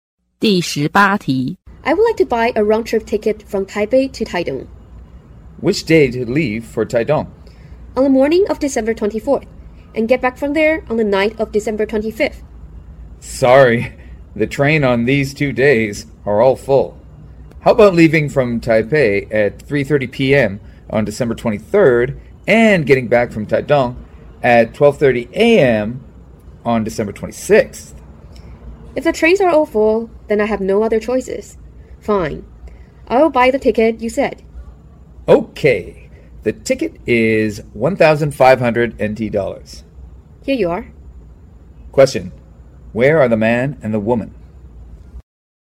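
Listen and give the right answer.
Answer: At a train station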